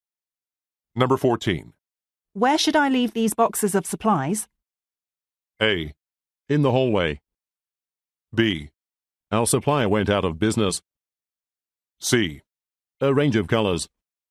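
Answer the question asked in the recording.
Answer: A: In the hallway.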